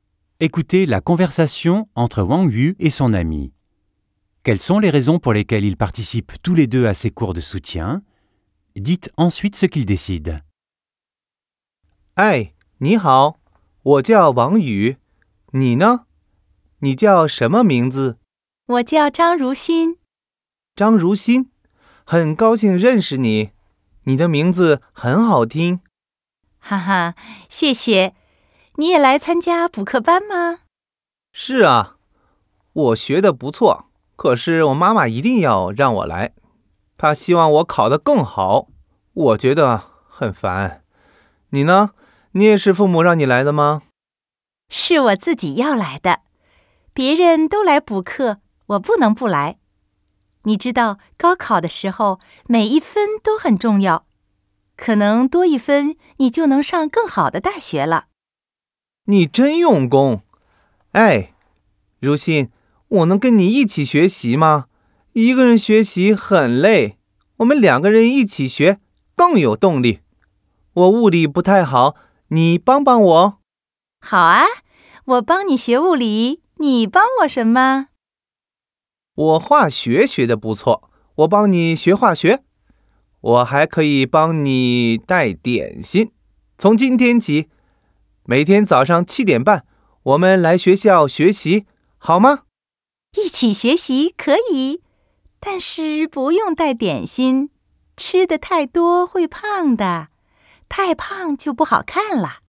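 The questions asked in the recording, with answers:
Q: Quelles sont les raisons pour lesquelles ils participent tous les deux à ces cours de soutien?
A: Wang Yu vient parce que sa mère l'y oblige pour qu'il ait de meilleures notes ; Zhang Ruxin vient de lui-même parce que tout le monde y va et que chaque point compte au gaokao pour entrer dans une meilleure université.

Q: Dites ensuite ce qu'ils décident.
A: Ils décident d'étudier ensemble à l'école tous les jours à 7h30 : Zhang Ruxin aide Wang Yu en physique et Wang Yu l'aide en chimie, mais sans apporter de goûter.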